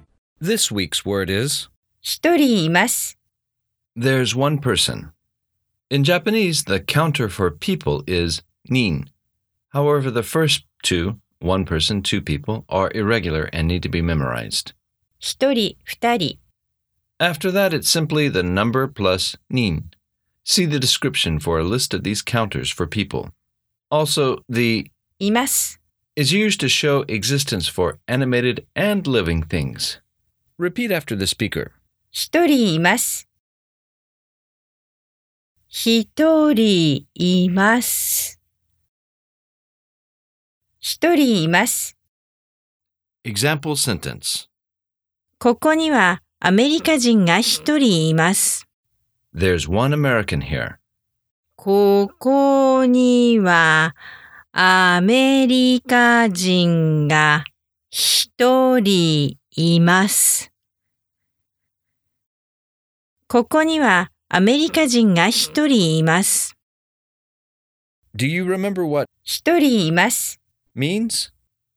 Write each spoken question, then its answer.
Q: Do you remember what 一人います means?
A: There's one person.